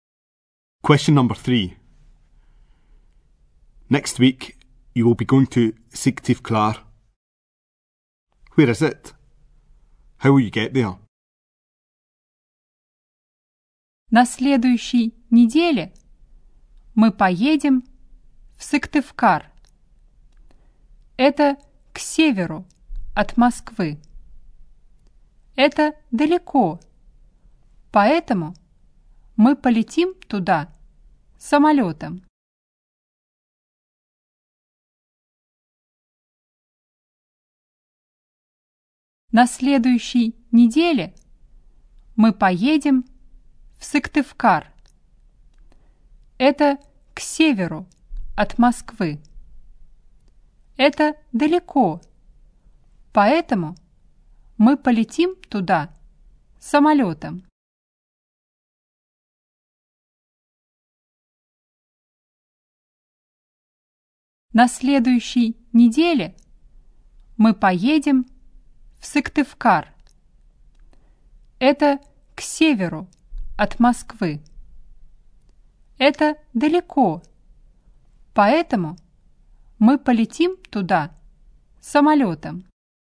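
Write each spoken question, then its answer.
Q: Where is it?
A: North of Moscow

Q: How will you get there?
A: By plane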